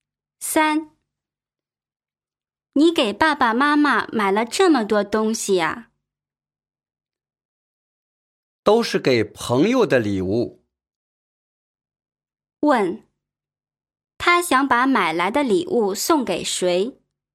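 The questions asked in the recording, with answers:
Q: 问,他想把买来的礼物送给谁?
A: 朋友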